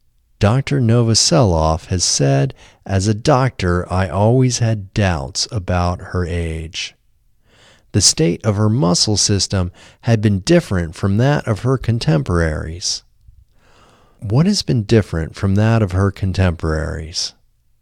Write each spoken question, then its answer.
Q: What has been different from that of her contemporaries?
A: The state of her muscle system has been different from that of her contemporaries.